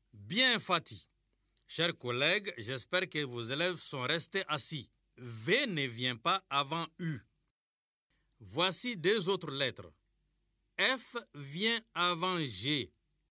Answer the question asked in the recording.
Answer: Monsieur, je me suis levé.